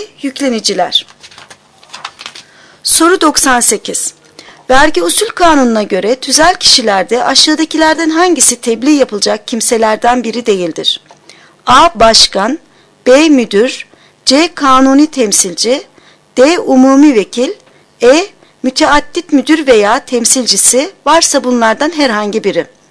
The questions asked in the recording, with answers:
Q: Vergi Usul Kanunu'na göre tüzel kişilerde aşağıdakilerden hangisi tebliğ yapılacak kimselerden biri değildir?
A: Doğru cevap D. Umumi vekil.